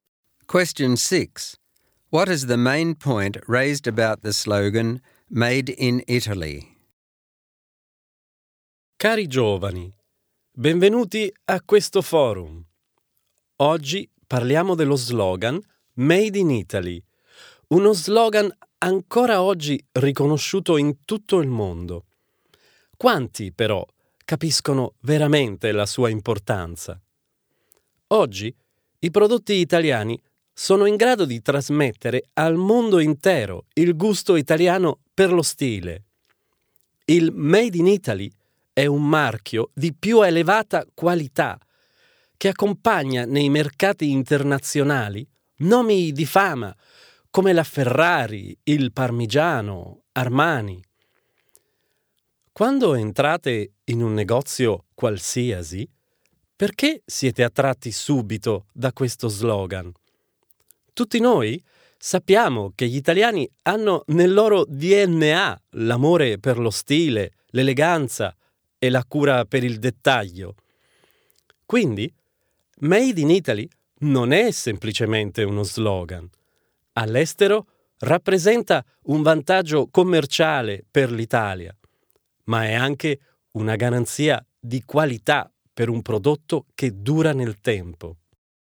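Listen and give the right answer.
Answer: It is more than a slogan: it gives Italy a commercial advantage abroad and guarantees lasting quality.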